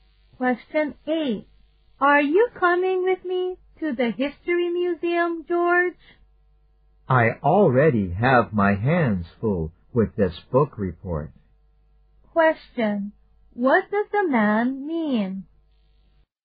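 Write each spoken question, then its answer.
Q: What does the man mean?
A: He can't go to the museum because he is busy with his book report.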